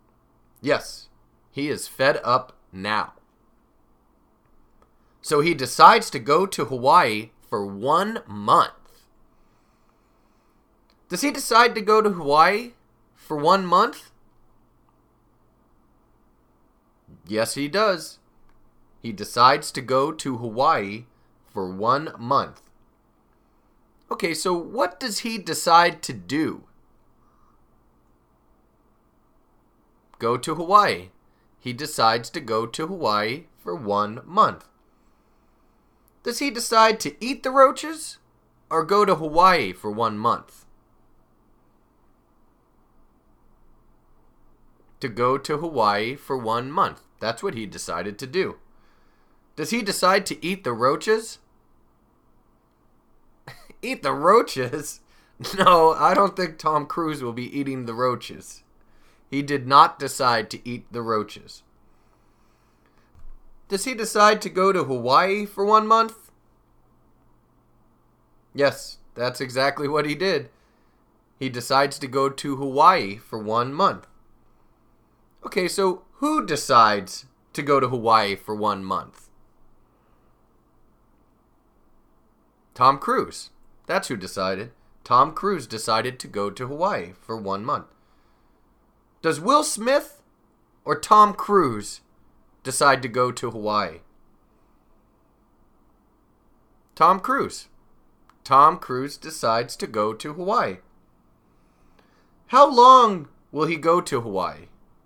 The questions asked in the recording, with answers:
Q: How long will he go to Hawaii?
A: Well, he will go for 1 month.